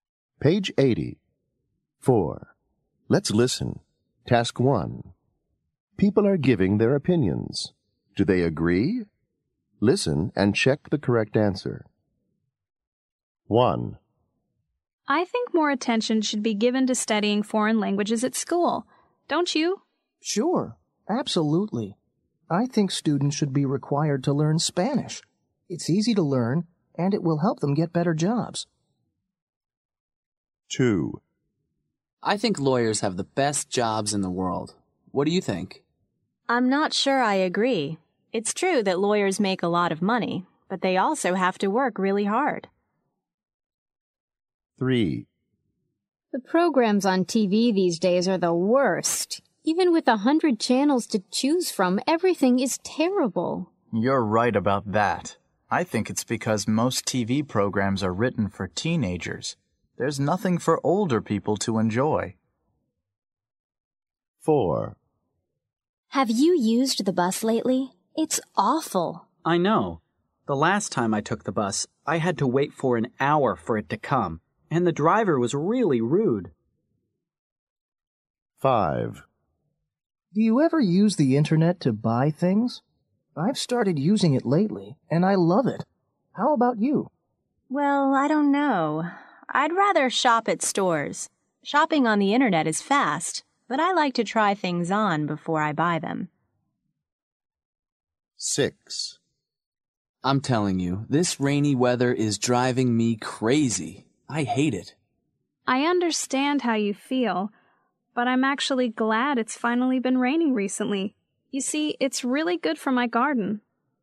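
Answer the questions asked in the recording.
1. Yes, they agree
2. No, they disagree
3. Yes, they agree
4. Yes, they agree
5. No, they disagree
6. No, they disagree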